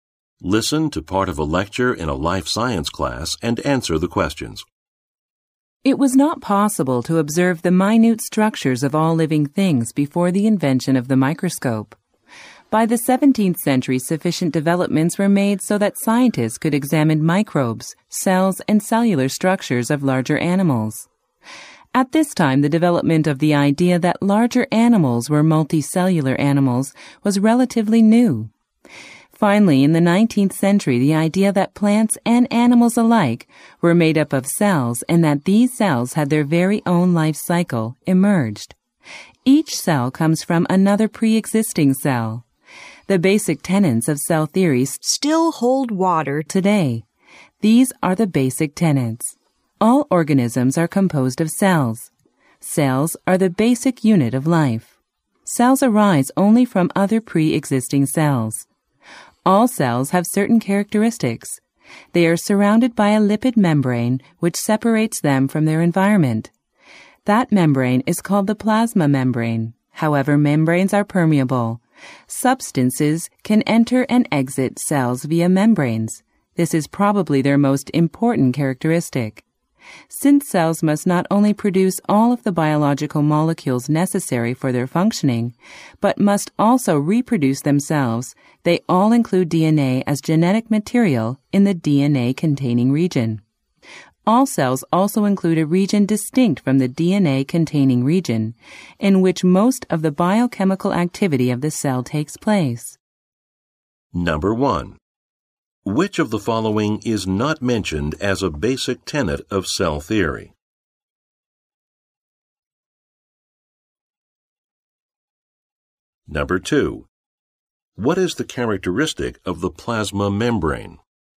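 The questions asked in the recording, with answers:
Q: What is the characteristic of the plasma membrane?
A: It is permeable, so substances can enter and exit the cell through it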